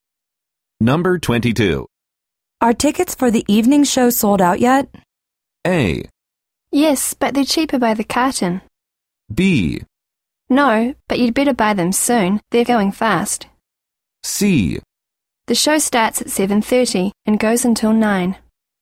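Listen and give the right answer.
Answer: B: No, but you'd better buy them soon. They're going fast.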